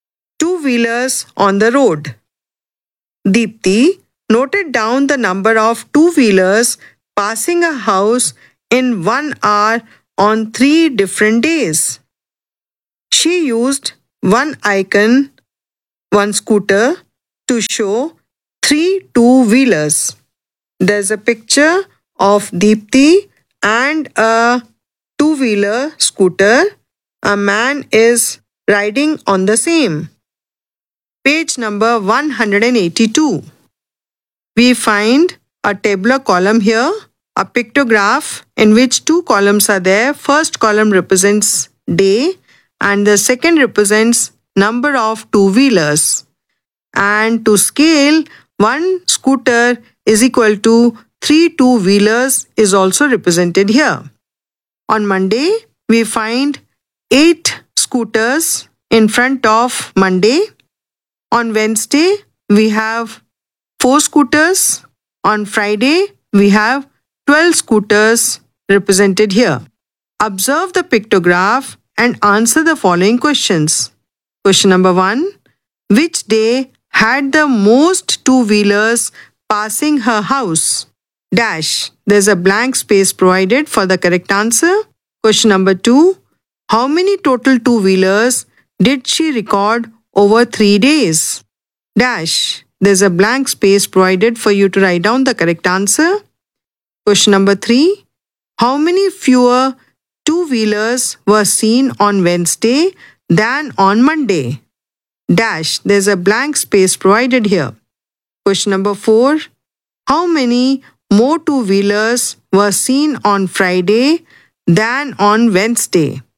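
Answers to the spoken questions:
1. Friday
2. 72
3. 12
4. 24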